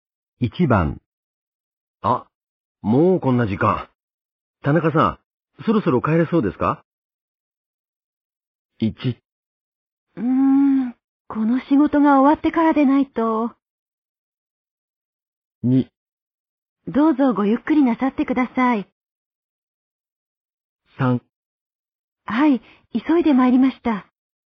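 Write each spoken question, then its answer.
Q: あ、もうこんな時間。田中さん、そろそろ帰れそうですか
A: 1: この仕事が終わってからでないと。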